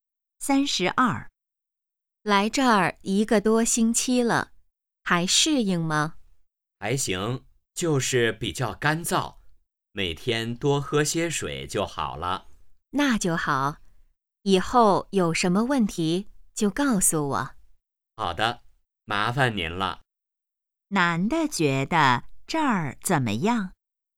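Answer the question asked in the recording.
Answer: 还行,就是比较干燥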